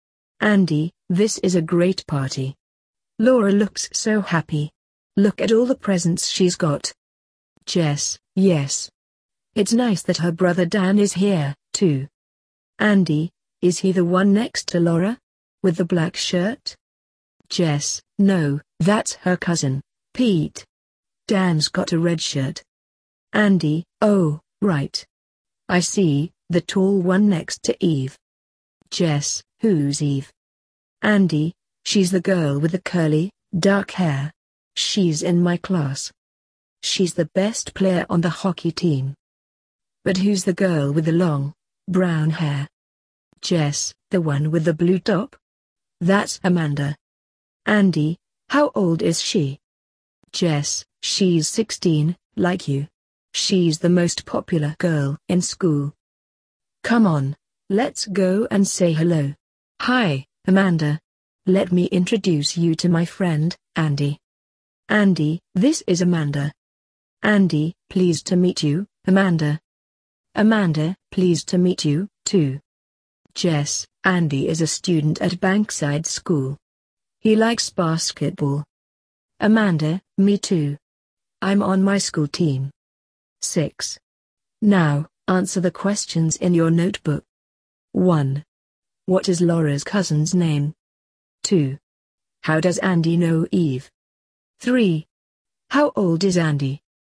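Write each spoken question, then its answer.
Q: What is Laura's cousin's name?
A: Pete

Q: How does Andy know Eve?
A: She's in his class.

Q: How old is Andy?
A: 16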